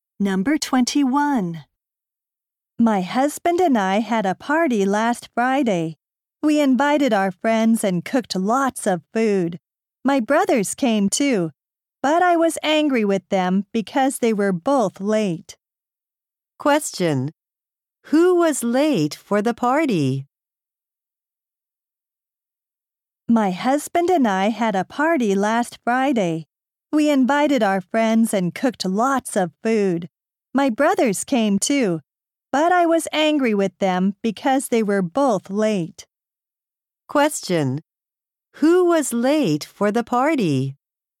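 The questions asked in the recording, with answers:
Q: Who was late for the party?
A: Her brothers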